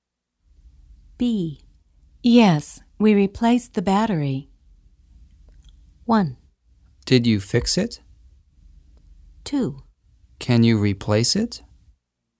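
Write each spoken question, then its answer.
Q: Yes, we replaced the battery.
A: 1: Did you fix it?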